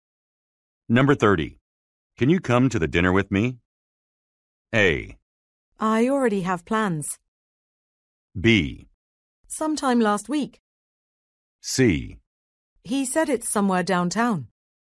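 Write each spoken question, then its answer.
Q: Can you come to the dinner with me?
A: A: I already have plans.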